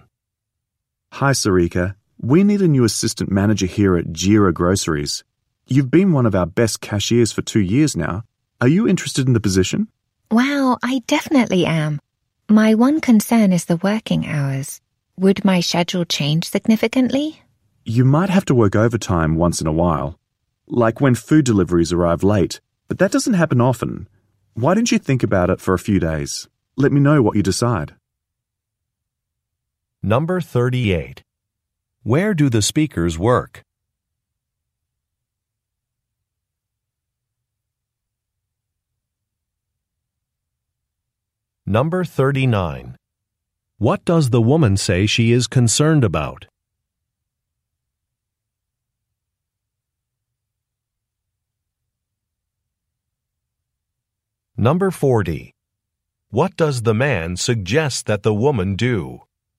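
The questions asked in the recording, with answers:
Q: Where do the speakers work?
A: At a grocery store (Jira Groceries)

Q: What does the woman say she is concerned about?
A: The working hours / her schedule

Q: What does the man suggest that the woman do?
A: Think about the offer for a few days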